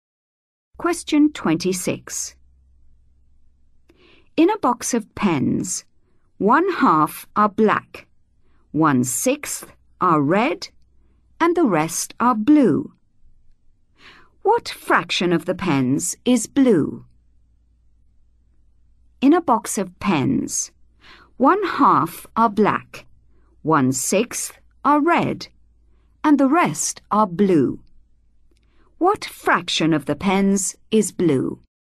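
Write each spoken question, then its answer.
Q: What fraction of the pens is blue?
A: 1/3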